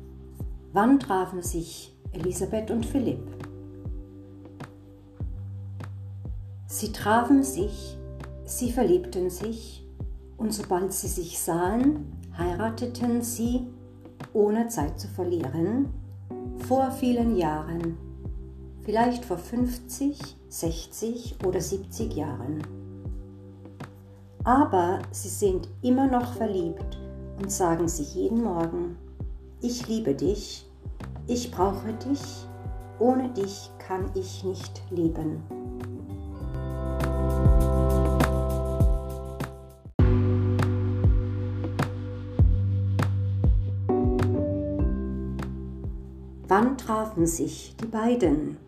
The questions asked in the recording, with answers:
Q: Wann trafen sich Elisabeth und Philipp?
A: Die beiden trafen sich vor vielen Jahren.